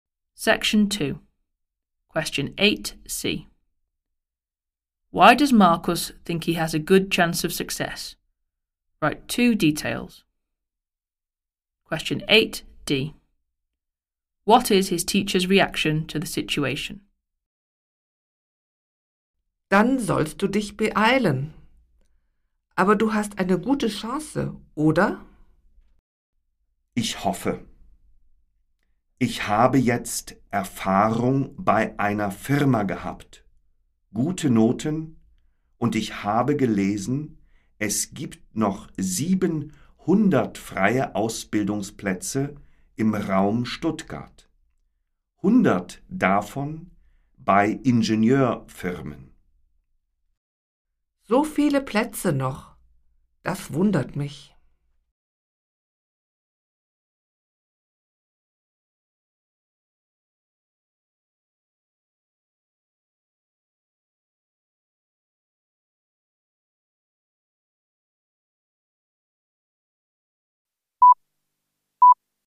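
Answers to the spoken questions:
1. He has work experience and good grades; there are still 700 free places
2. Surprised that there are so many places left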